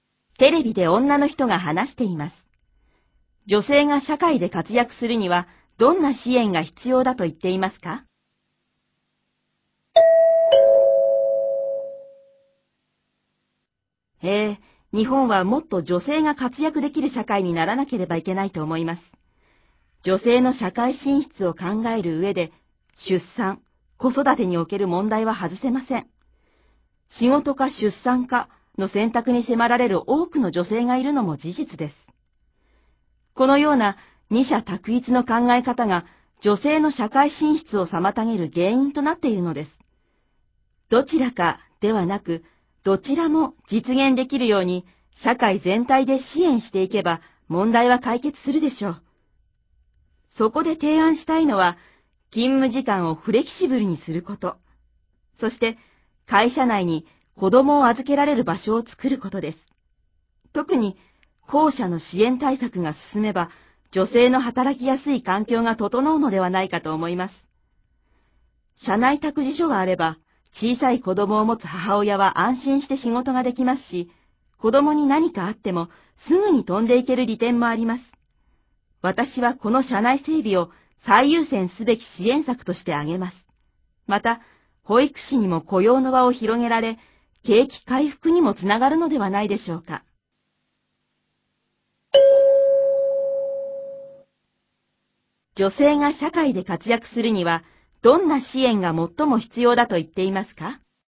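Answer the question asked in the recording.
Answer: 会社内に子供を預けられる場所(社内託児所)を作ること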